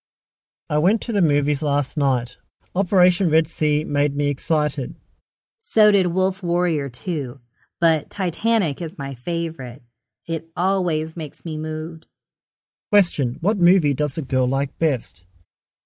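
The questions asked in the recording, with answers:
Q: what movie does the girl like best?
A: Titanic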